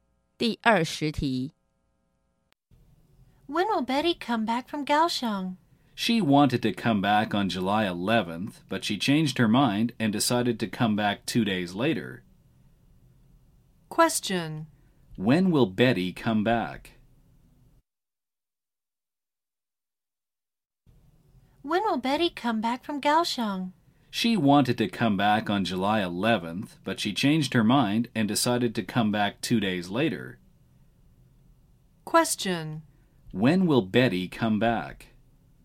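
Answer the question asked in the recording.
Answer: On July 13th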